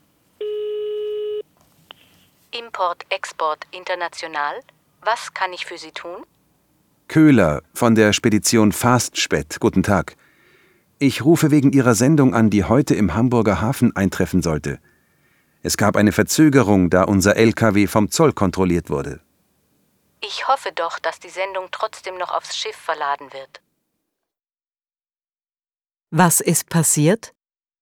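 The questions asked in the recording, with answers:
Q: Was ist passiert?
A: Der LKW wurde vom Zoll kontrolliert, die Sendung verzögert sich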